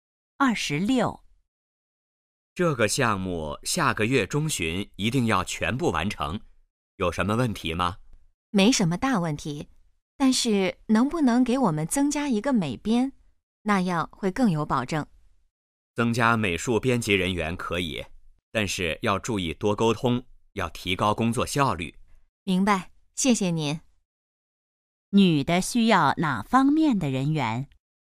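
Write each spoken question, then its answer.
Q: 女的需要哪方面的人员?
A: 美术编辑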